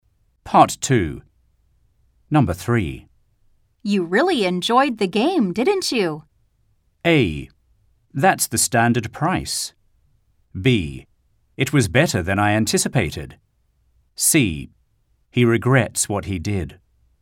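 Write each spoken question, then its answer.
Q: You really enjoyed the game, didn't you?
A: B: It was better than I anticipated.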